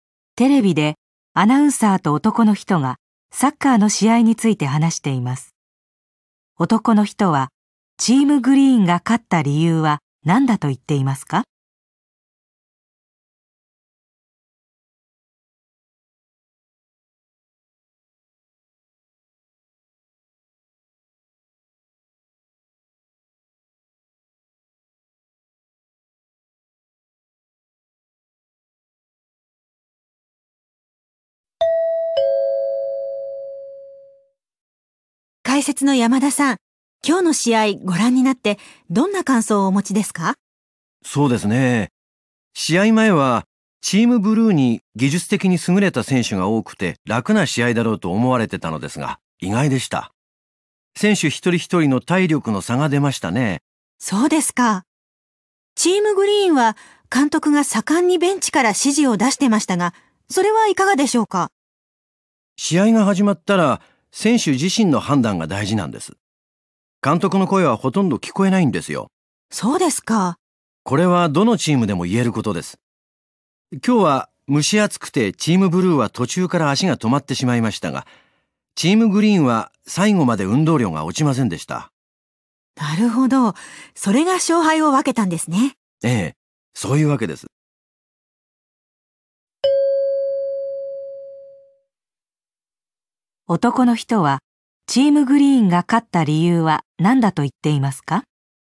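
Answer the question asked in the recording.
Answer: 選手の体力があり、最後まで運動量が落ちなかったから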